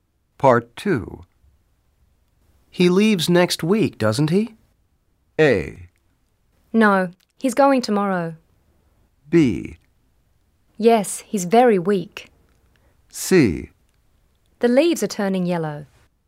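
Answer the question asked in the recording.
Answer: A: No, he's going tomorrow.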